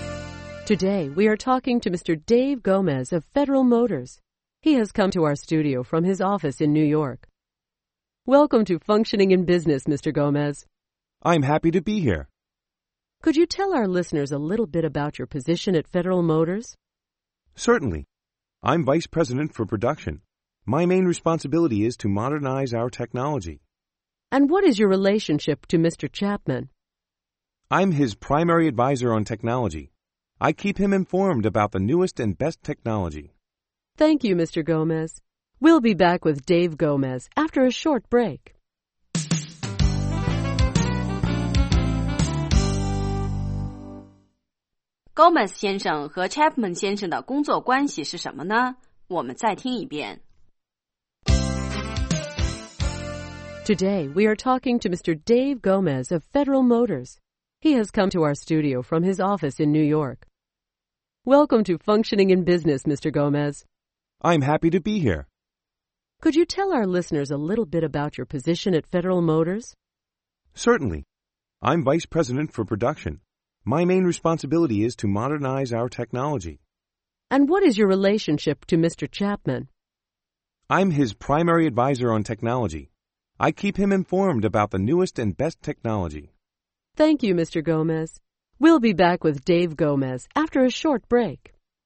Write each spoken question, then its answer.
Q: Gomez 先生和 Chapman 先生的工作关系是什么呢?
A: I'm his primary advisor on technology.